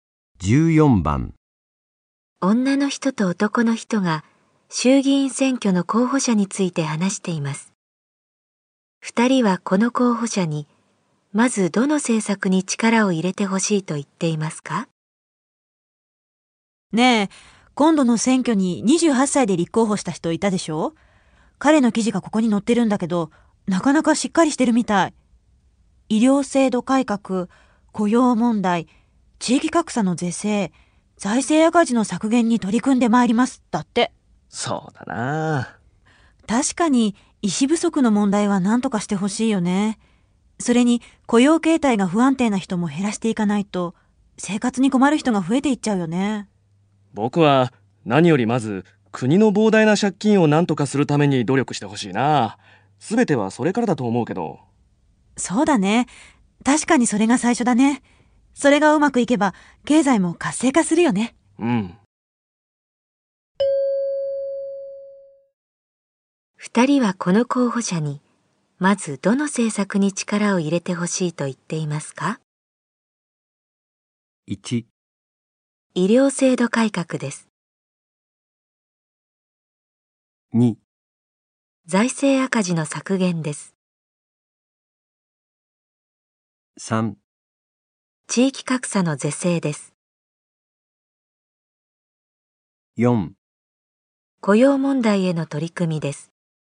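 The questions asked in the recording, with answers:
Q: 人はこの候補者に、まずどの政策に力を入れてほしいと言っていますか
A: 2: 財政赤字の削減です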